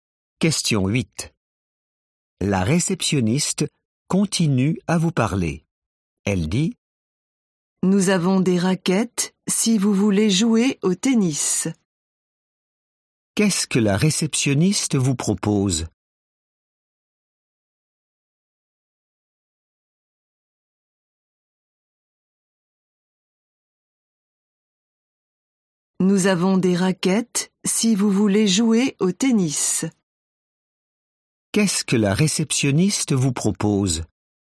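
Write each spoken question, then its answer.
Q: Qu'est-ce que la réceptionniste vous propose ?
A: des raquettes pour jouer au tennis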